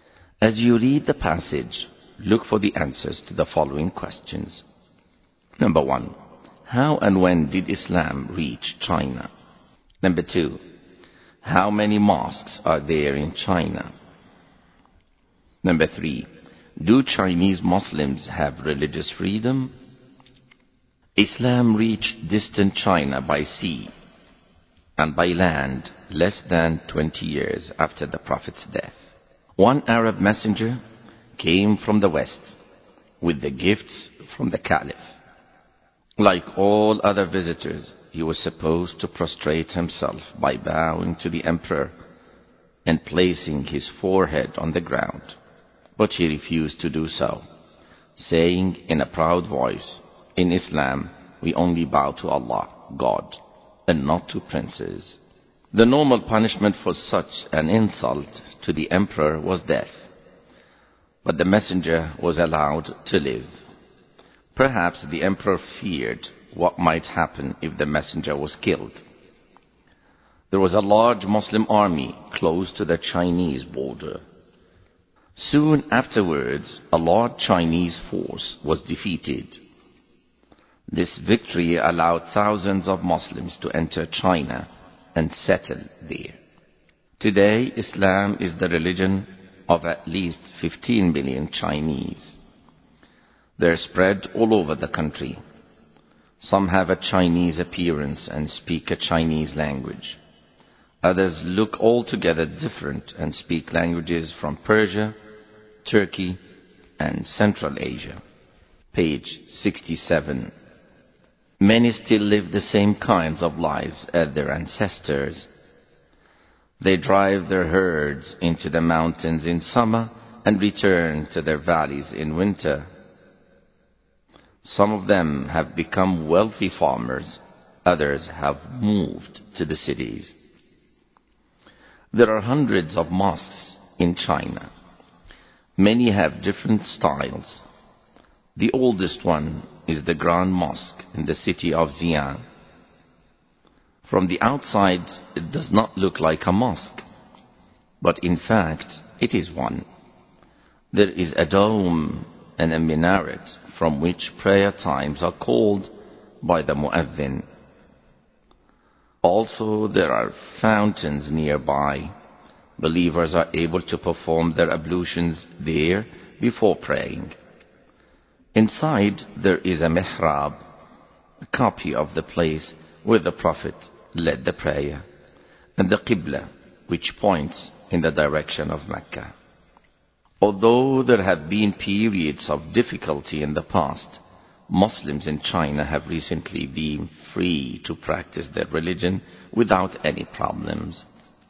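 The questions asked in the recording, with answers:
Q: How and when did Islam reach China?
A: By sea and by land, less than 20 years after the Prophet's death

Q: How many mosques are there in China?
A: Hundreds

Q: Do Chinese Muslims have religious freedom?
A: Yes, recently they have been free to practice their religion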